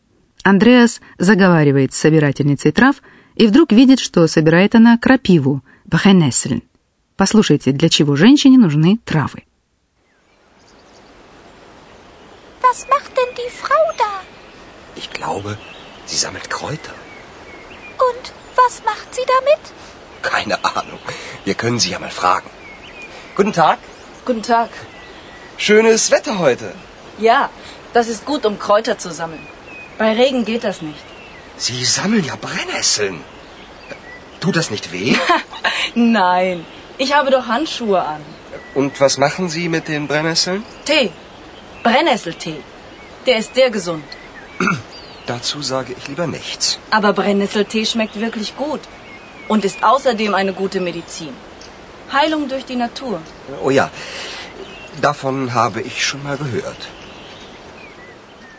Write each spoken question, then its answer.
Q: Послушайте, для чего женщине нужны травы.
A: Андреас узнает, что она готовит из крапивы настой, чай, Brennnesseltee.